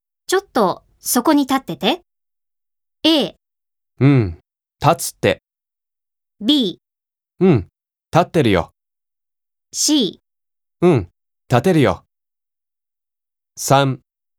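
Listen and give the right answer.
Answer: B: うん立ってるよ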